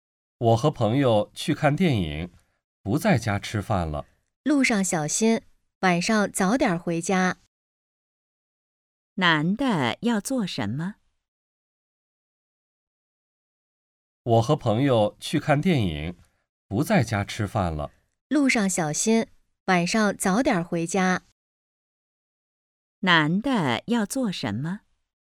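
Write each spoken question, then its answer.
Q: 男的要做什么?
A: 和朋友去看电影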